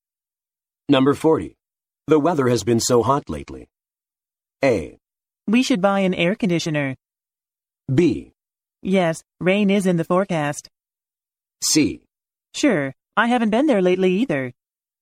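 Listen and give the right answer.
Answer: A: We should buy an air conditioner.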